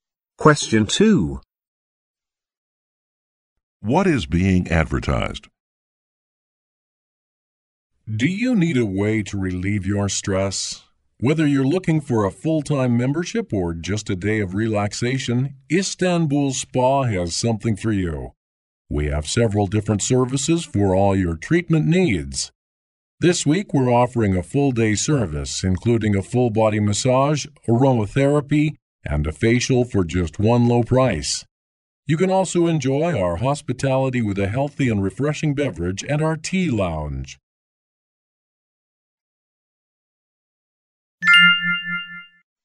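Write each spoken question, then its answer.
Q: What is being advertised?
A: A spa (Istanbul Spa)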